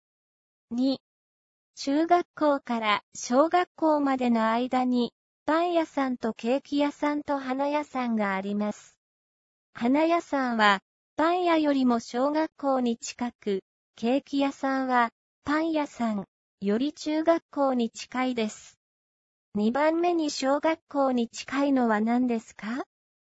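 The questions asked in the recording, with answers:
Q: 2番目に小学校に近いのは何ですか?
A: パン屋さん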